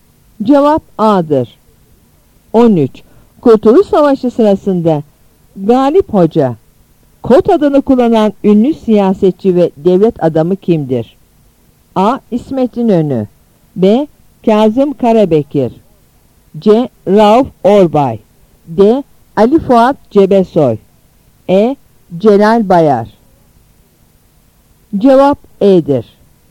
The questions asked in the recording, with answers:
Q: Kurtuluş Savaşı sırasında Galip Hoca, KOT adını kullanan ünlü siyasetçi ve devlet adamı kimdir?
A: Cevap E'dir.